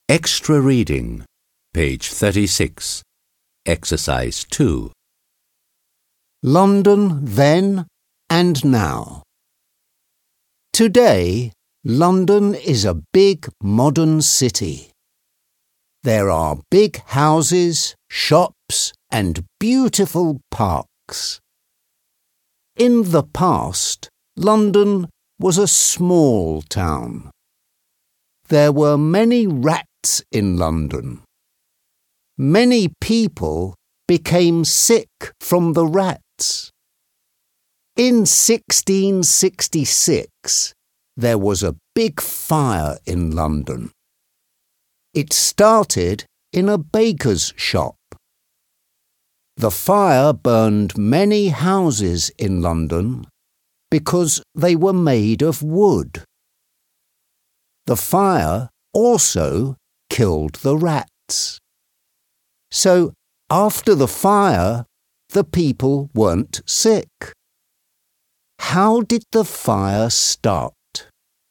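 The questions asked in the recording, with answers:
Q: How did the fire start?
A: It started in a baker's shop.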